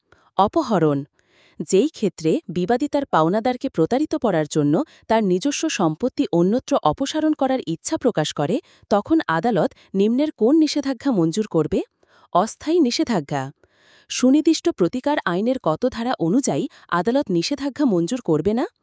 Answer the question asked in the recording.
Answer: ৫৬ ধারা।